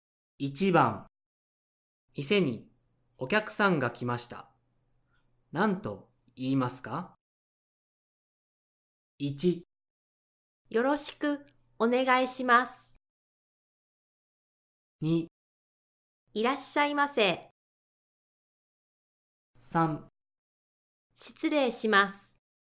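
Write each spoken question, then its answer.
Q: 店にお客さんが来ました。何と言いますか?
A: 2: いらっしゃいませ。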